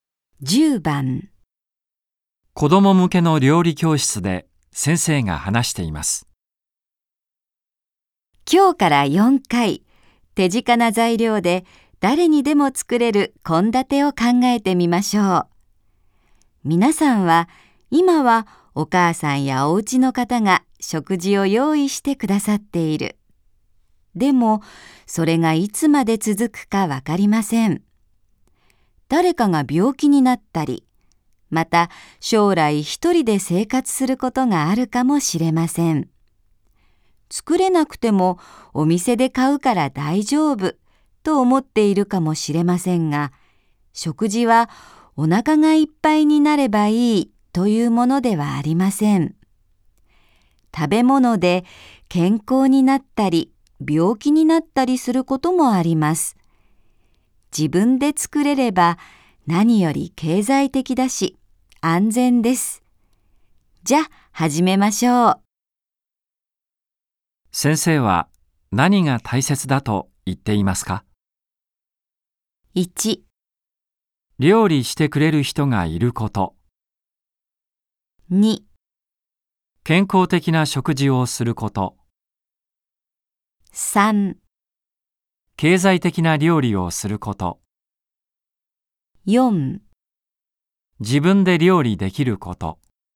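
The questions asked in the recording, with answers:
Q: 先生は何が大切だと言っていますか ?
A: 4: 自分で料理できること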